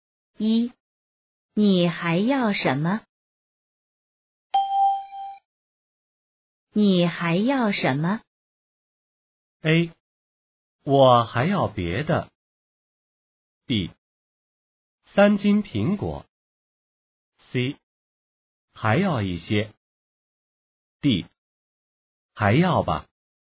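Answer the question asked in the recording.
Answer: B: 三斤苹果。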